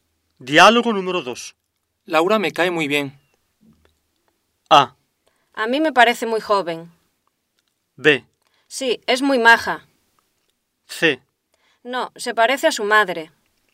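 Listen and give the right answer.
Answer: B: Sí, es muy maja.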